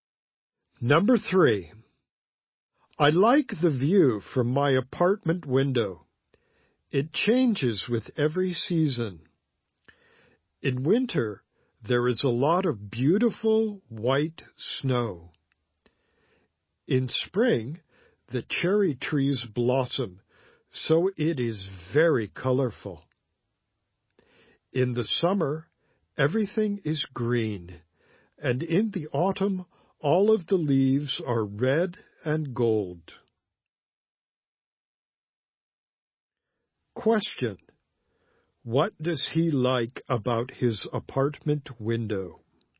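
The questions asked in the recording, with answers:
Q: What does he like about his apartment window?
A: The view changes with every season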